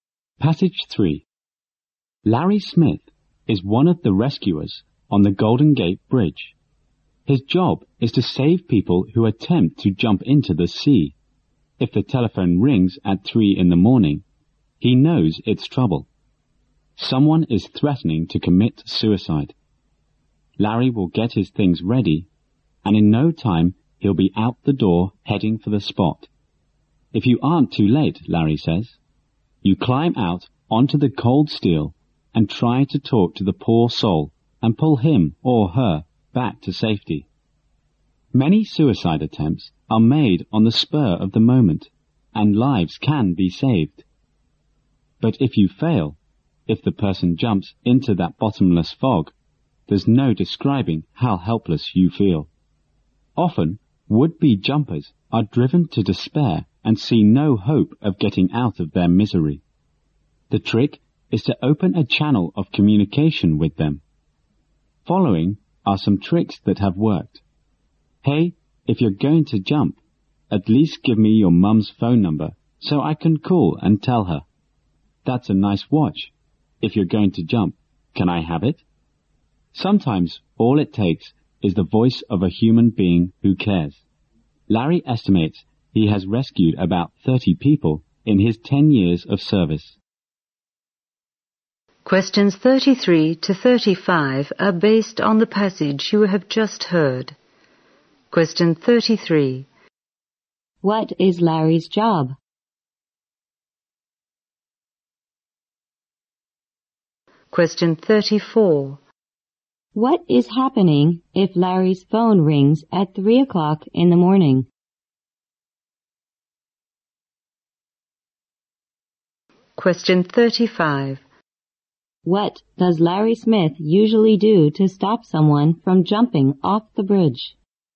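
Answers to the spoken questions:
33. Rescuing people who try to jump off the Golden Gate Bridge
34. Someone is threatening to commit suicide
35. He talks to them to open communication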